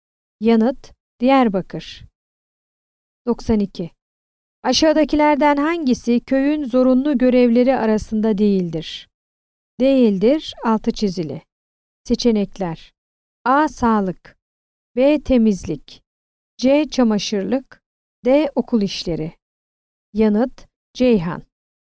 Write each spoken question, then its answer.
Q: Aşağıdakilerden hangisi köyün zorunlu görevleri arasında değildir?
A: Yanıt: Ceyhan.